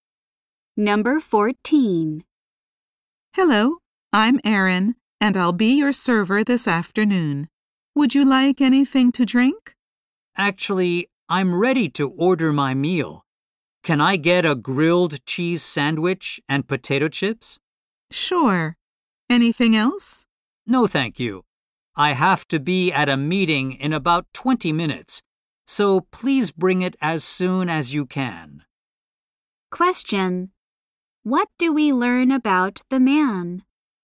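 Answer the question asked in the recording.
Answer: He has a meeting in about 20 minutes.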